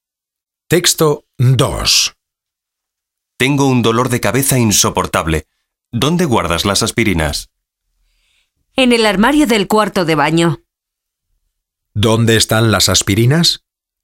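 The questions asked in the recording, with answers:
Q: ¿Dónde están las aspirinas?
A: En el armario del cuarto de baño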